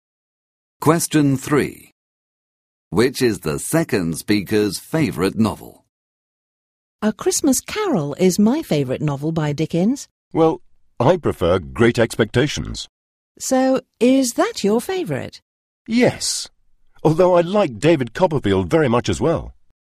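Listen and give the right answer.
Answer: Great Expectations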